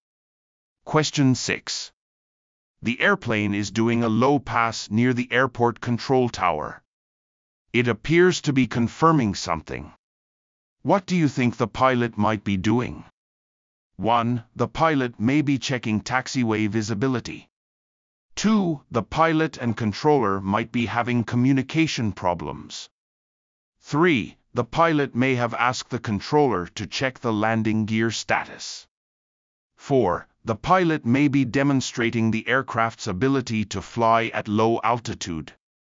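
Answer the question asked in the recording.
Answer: 3: The pilot may have asked the controller to check the landing gear status.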